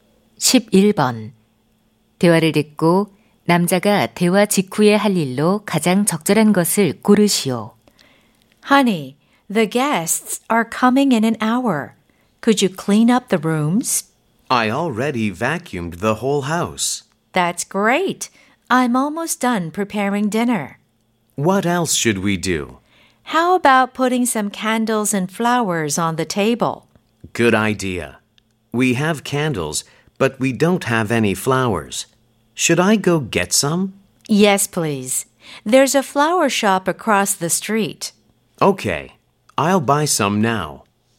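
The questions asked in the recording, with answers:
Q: 대화를 듣고 남자가 대화 직후에 할 일로 가장 적절한 것을 고르시오.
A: 꽃 사러 가기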